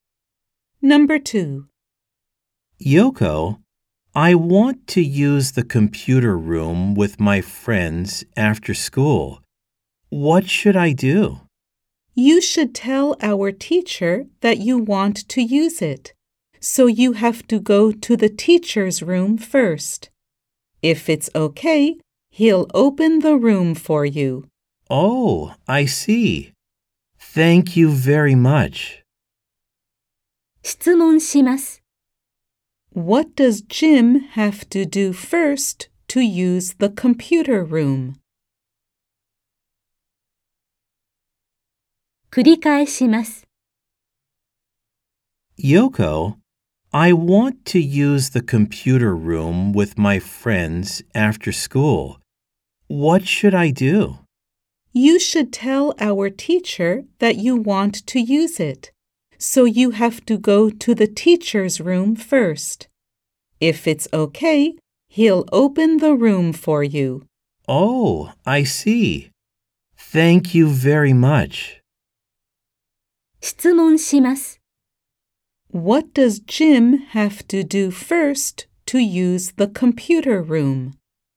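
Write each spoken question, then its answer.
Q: What does Jim have to do first to use the computer room?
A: He has to go to the teacher's room.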